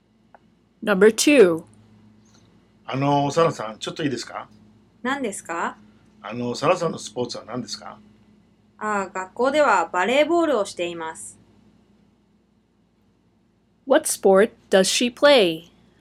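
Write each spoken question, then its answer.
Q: What sport does she play?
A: Volleyball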